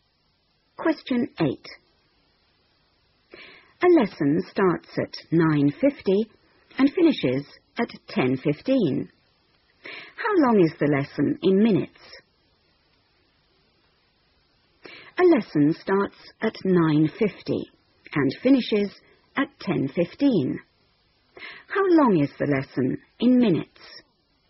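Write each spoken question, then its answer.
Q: How long is the lesson in minutes?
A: 25 minutes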